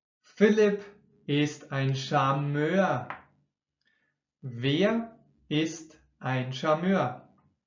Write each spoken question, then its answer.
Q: Wer ist ein Charmeur?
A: Philipp. Philipp ist ein Charmeur.